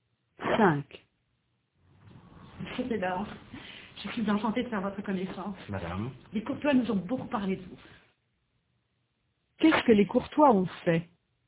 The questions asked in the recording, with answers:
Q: Qu'est-ce que les Courtois ont fait?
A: Ils ont beaucoup parlé de Robert au Bello.